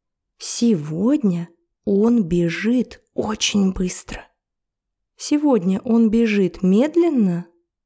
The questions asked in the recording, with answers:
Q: Сегодня он бежит медленно?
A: Нет, наоборот. Сегодня он бежит очень быстро.